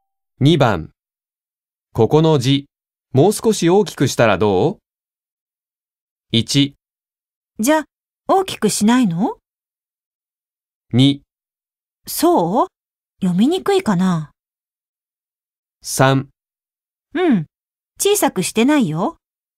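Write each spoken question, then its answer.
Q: ここの字、もう少し大きくしたらどう ?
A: 2: そう?読みにくいかな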